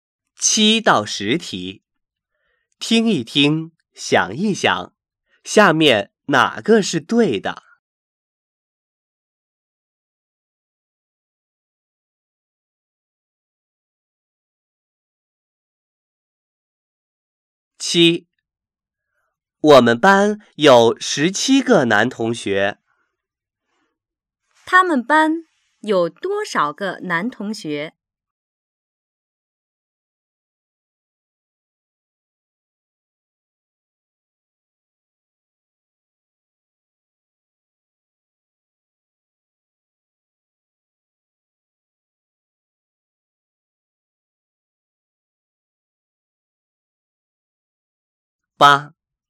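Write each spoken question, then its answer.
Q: 他们班有多少个男同学?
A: 17个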